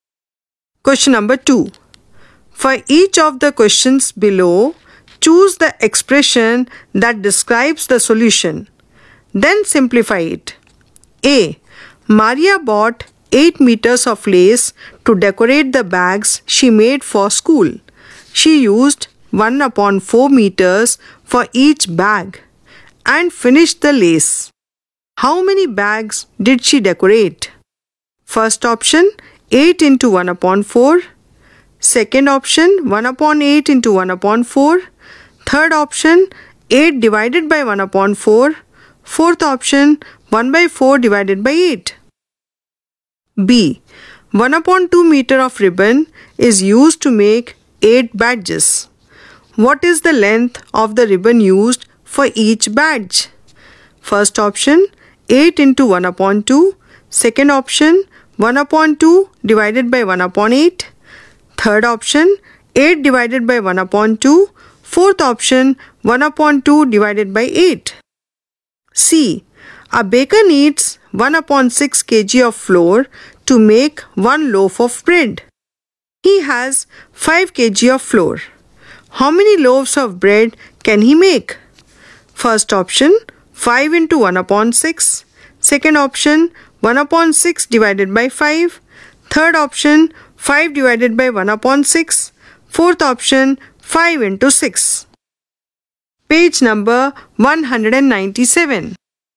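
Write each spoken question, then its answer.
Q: How many bags did she decorate?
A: Third option: 8 divided by 1 upon 4 (32 bags)

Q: What is the length of the ribbon used for each badge?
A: Fourth option: 1 upon 2 divided by 8 (1/16 meter)

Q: How many loaves of bread can he make?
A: Third option: 5 divided by 1 upon 6 (30 loaves)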